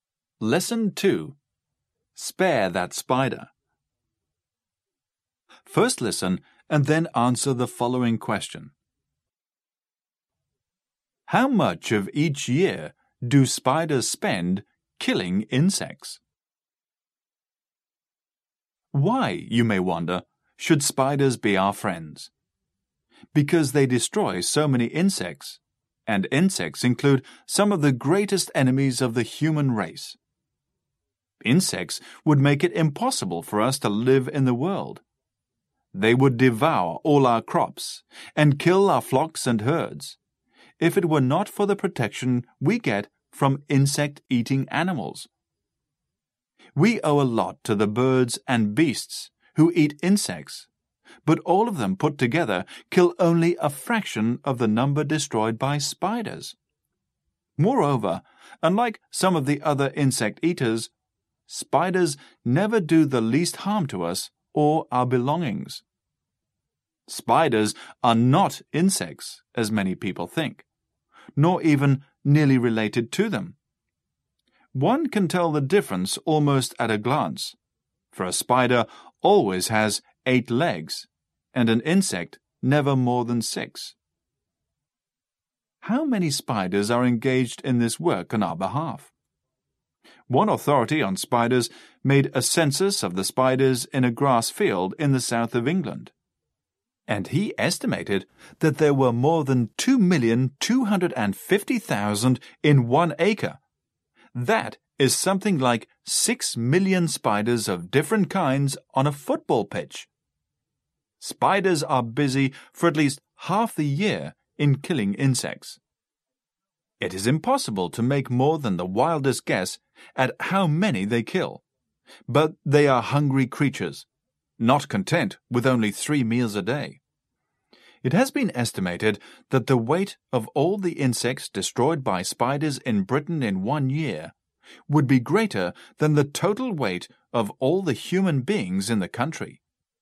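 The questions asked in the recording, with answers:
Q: How much of each year do spiders spend killing insects?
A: At least half the year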